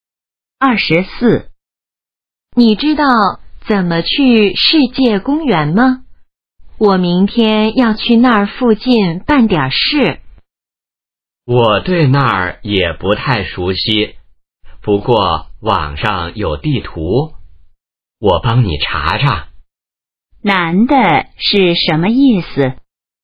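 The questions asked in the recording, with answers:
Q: 男的是什么意思?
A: 他也不熟悉,可以帮忙上网查地图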